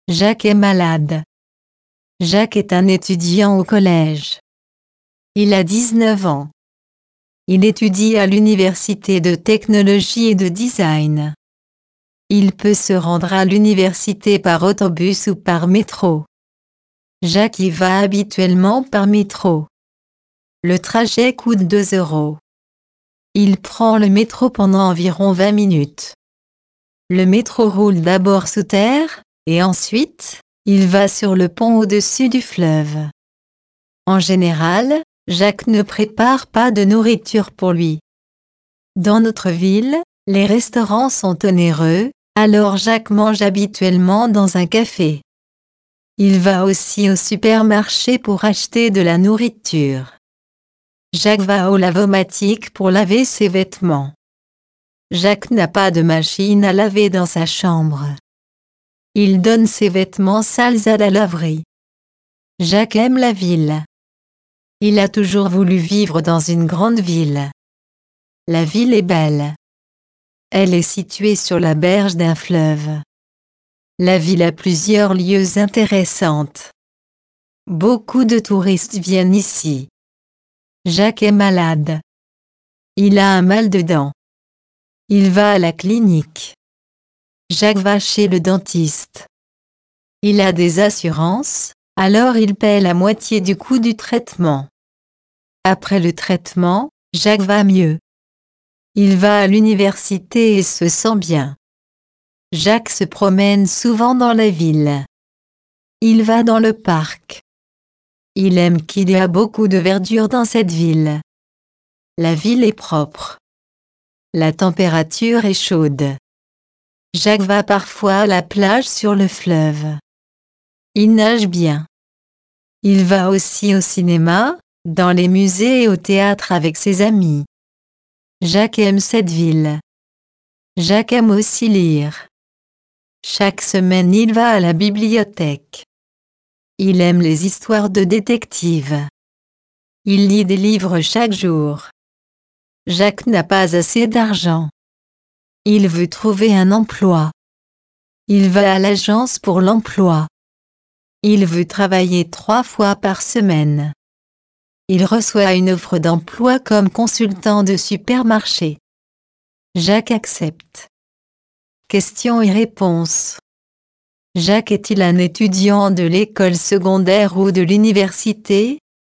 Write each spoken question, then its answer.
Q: Jacques est-il un étudiant de l'école secondaire ou de l'université?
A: Jacques est un étudiant à l'université.